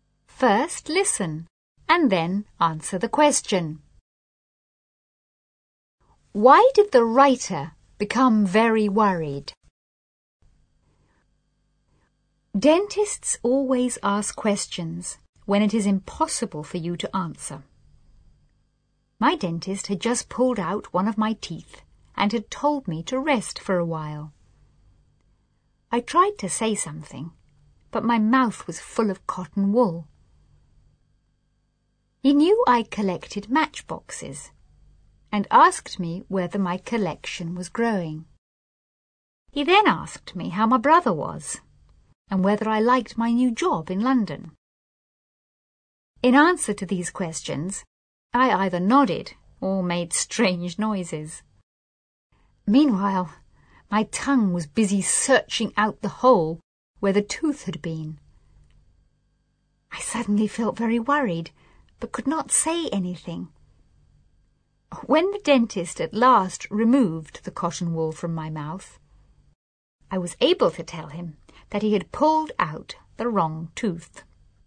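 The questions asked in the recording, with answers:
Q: Why did the writer become very worried?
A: Because the dentist had pulled out the wrong tooth.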